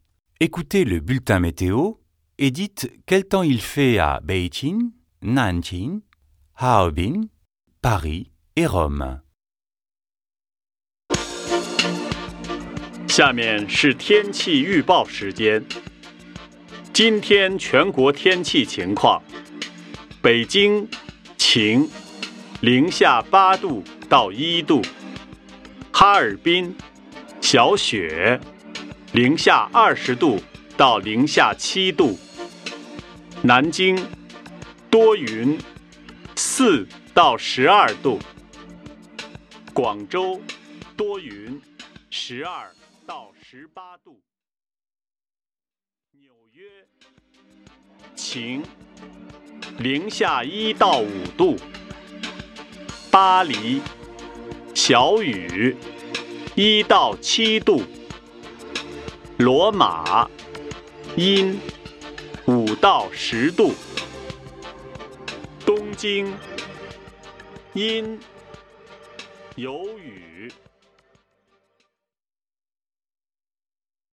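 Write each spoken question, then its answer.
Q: Écoutez le bulletin météo et dites quel temps il fait à Beijing, Nanjing, Harbin, Paris et Rome.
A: Beijing : ensoleillé, de -8 à 1 °C ; Nanjing : nuageux, de 4 à 12 °C ; Harbin : faible neige, de -20 à -7 °C ; Paris : pluie faible, de 1 à 7 °C ; Rome : couvert, de 5 à 10 °C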